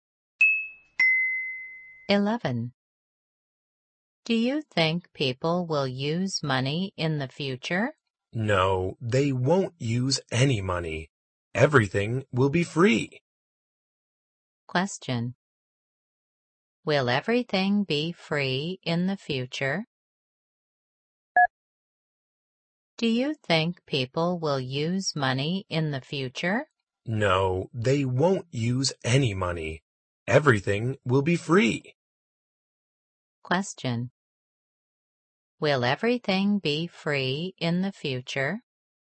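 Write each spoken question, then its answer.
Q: Will everything be free in the future?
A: Yes, everything will be free.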